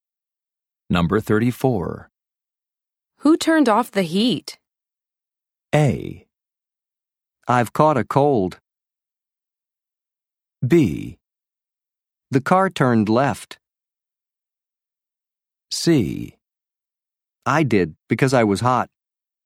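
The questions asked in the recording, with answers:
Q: Who turned off the heat?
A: C: I did, because I was hot.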